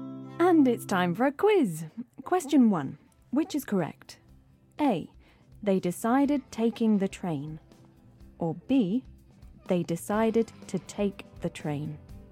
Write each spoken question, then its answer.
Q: Which is correct?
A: OK, so this is B. They decided to take the train.